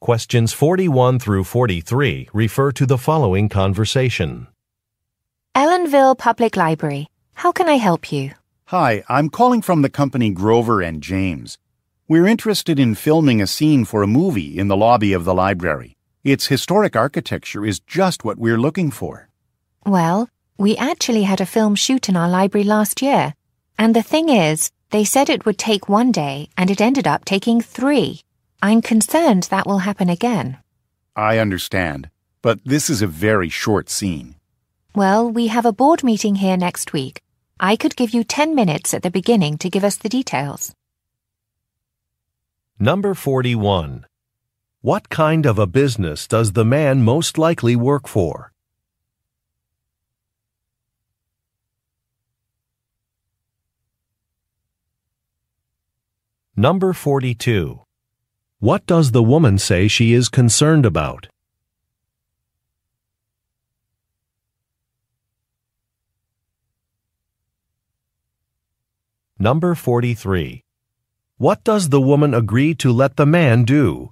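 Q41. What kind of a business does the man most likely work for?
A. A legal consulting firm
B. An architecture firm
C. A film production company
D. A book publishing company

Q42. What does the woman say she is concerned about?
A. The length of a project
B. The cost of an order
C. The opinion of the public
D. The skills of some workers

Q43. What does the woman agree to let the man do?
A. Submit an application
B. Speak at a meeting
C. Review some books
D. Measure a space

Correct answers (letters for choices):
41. C
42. A
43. B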